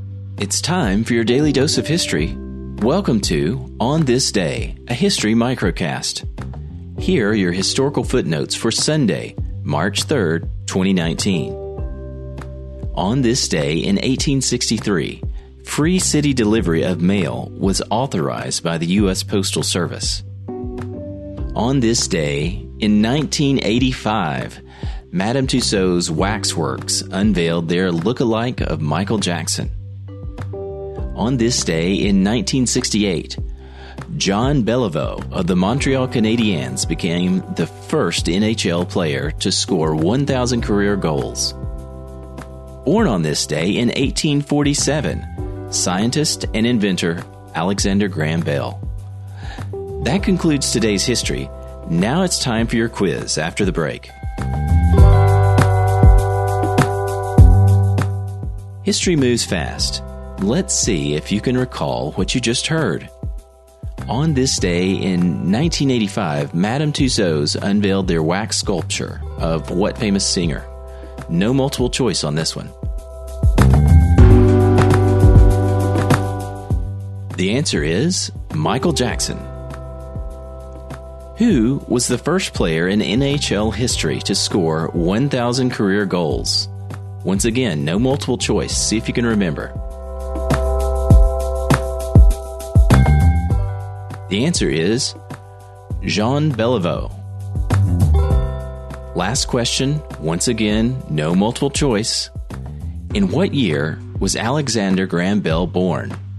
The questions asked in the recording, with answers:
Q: On this day in 1985, Madame Tussauds unveiled their wax sculpture of what famous singer?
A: The answer is Michael Jackson.

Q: In what year was Alexander Graham Bell born?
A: The answer is 1847.